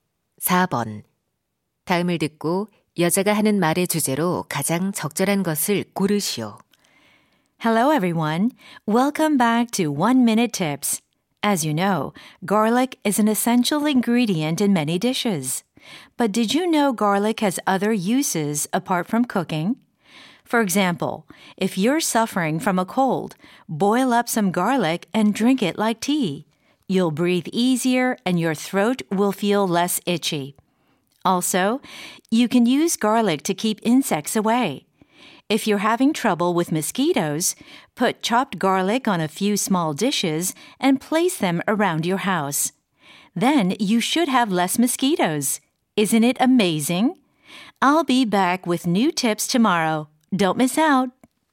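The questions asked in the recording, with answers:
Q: 다음을 듣고 여자가 하는 말의 주제로 가장 적절한 것을 고르시오.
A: 요리 외의 마늘의 다양한 용도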